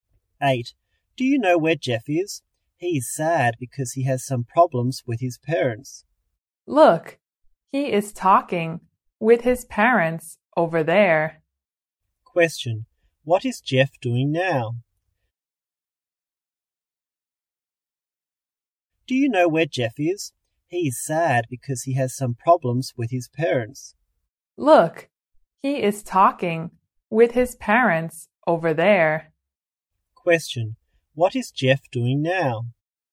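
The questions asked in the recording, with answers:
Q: What is Jeff doing now?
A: Talking with his parents.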